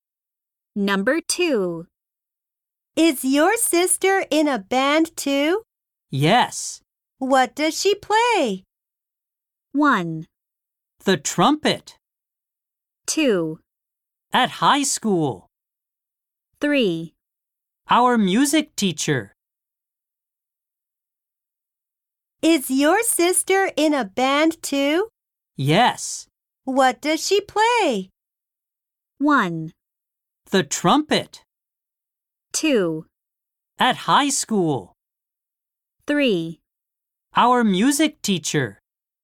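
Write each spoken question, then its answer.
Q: What does she play?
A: 1: The trumpet.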